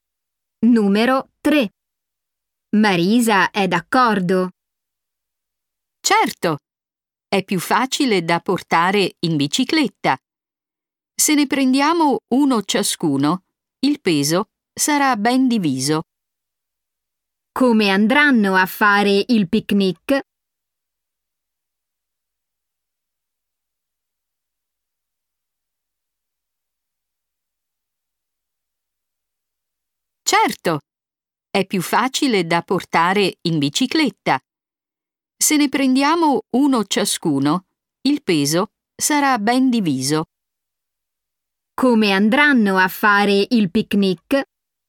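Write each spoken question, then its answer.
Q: Come andranno a fare il picnic?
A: In bicicletta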